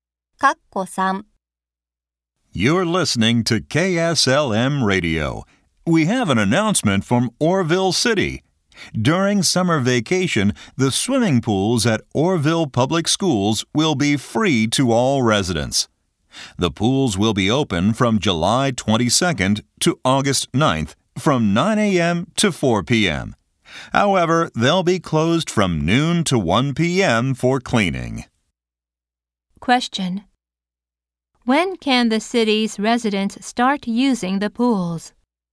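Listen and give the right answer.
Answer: On July 22nd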